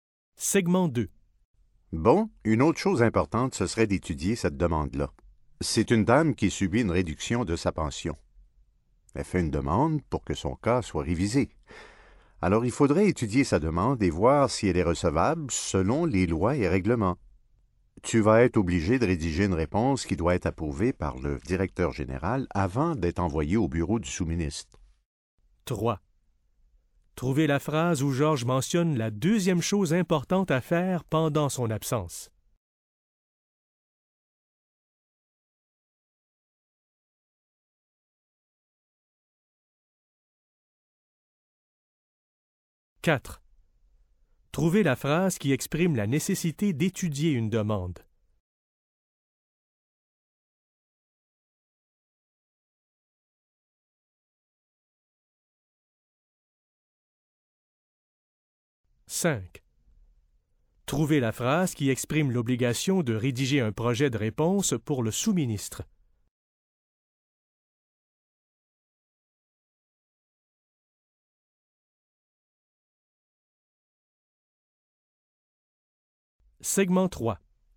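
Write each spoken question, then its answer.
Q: Trouvez la phrase où Georges mentionne la deuxième chose importante à faire pendant son absence.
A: Bon, une autre chose importante, ce serait d'étudier cette demande-là.

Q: Trouvez la phrase qui exprime la nécessité d'étudier une demande.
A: Il faudrait étudier sa demande et voir si elle est recevable selon les lois et règlements.

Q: Trouvez la phrase qui exprime l'obligation de rédiger un projet de réponse pour le sous-ministre.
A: Tu vas être obligé de rédiger une réponse qui doit être approuvée par le directeur général avant d'être envoyée au bureau du sous-ministre.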